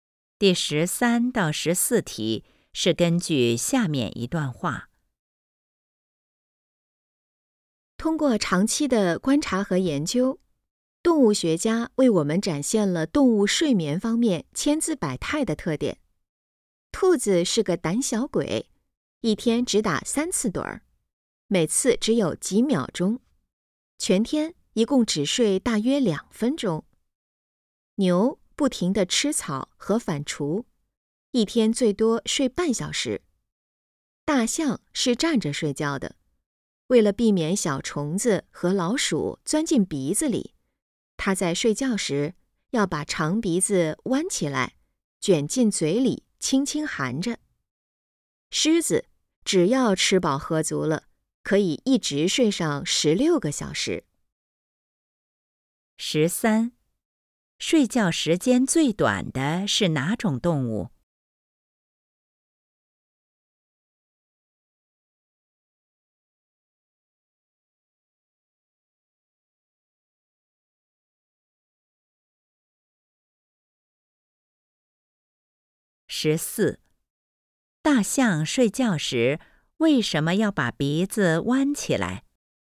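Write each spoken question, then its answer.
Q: 睡觉时间最短的是哪种动物?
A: 兔子

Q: 大象睡觉时为什么要把鼻子弯起来?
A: 避免小虫子和老鼠钻进鼻子里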